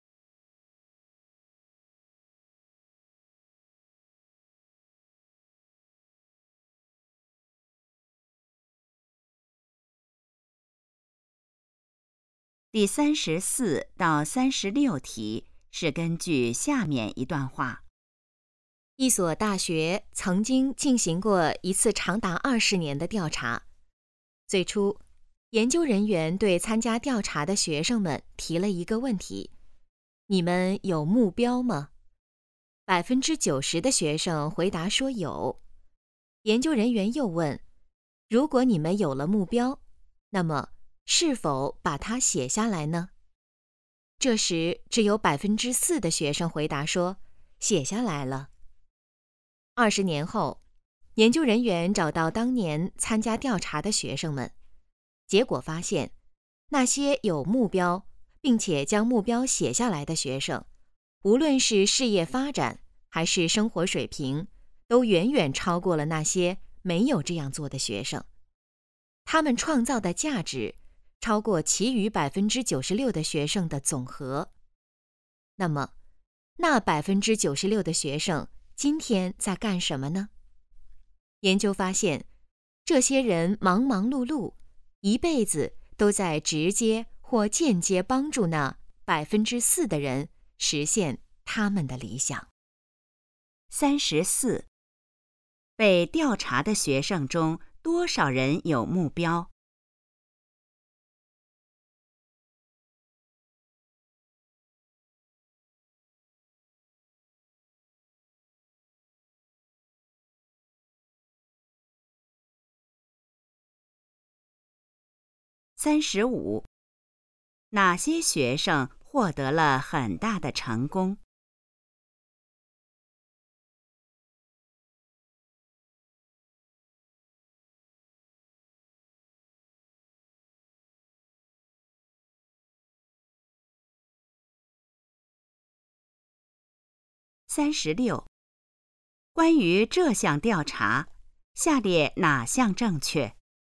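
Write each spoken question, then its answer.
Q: 被调查的学生中多少人有目标?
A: 90%

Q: 哪些学生获得了很大的成功?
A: 有目标并且把目标写下来的学生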